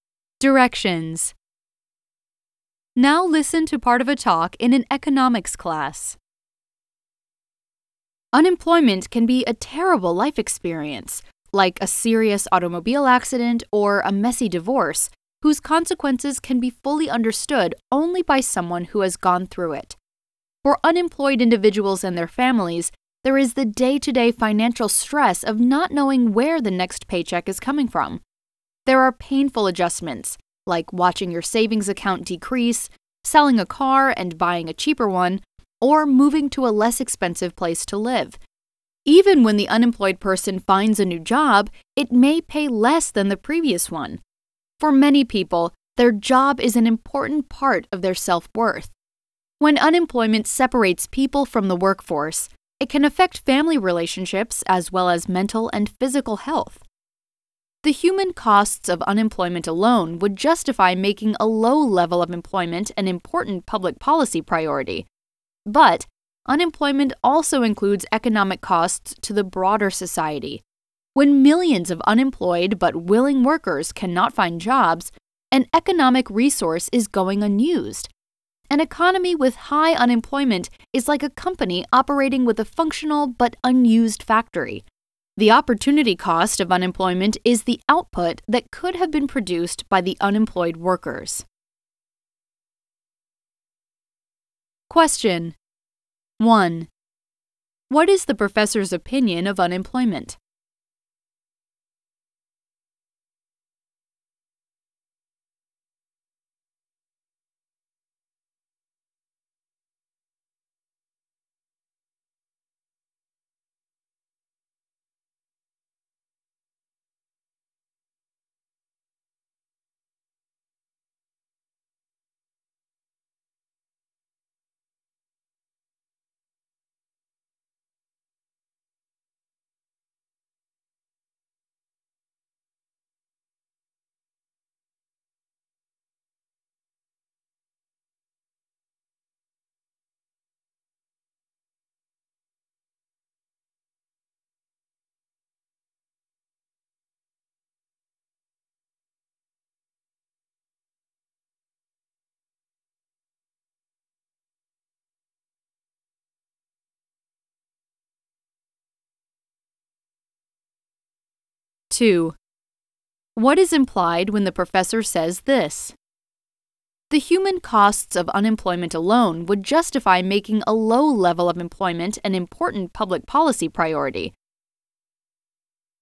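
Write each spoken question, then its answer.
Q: What is the professor's opinion of unemployment?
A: It is a terrible experience, with serious human and economic costs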